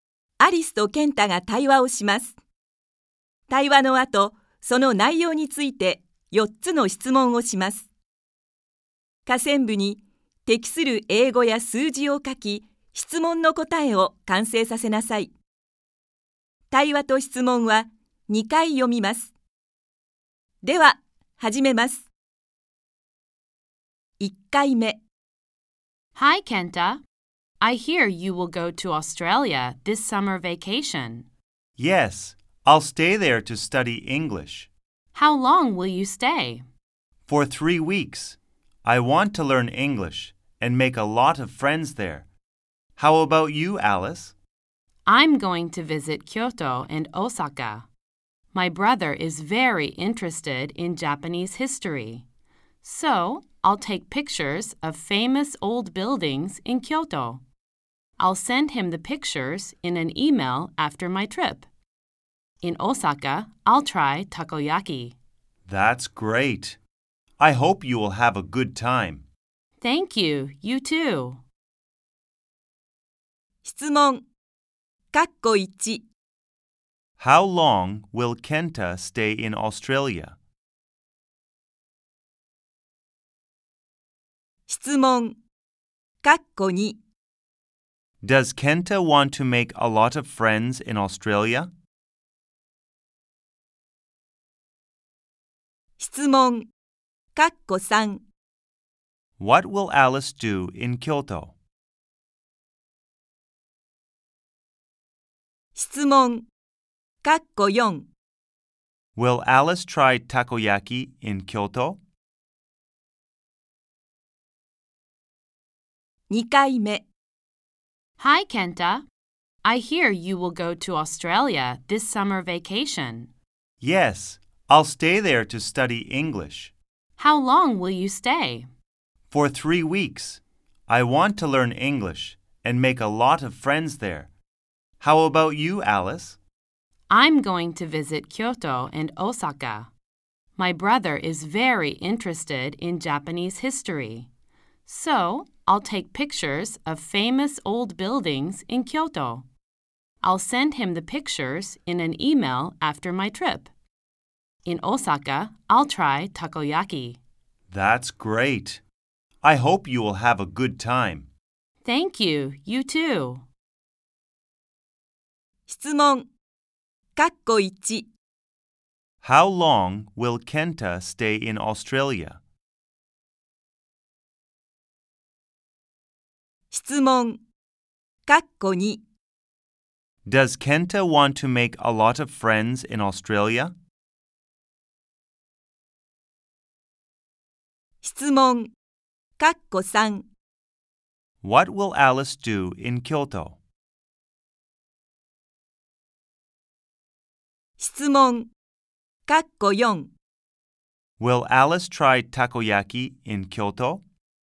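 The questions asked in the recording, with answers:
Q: How long will Kenta stay in Australia?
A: For three weeks.

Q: Does Kenta want to make a lot of friends in Australia?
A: Yes, he does.

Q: What will Alice do in Kyoto?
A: She will take pictures of famous old buildings.

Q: Will Alice try takoyaki in Kyoto?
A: No, she won't. She will try it in Osaka.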